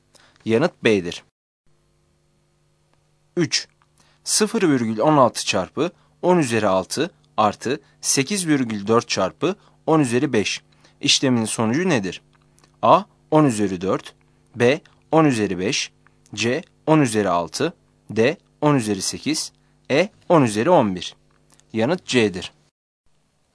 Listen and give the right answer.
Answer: Yanıt C'dir.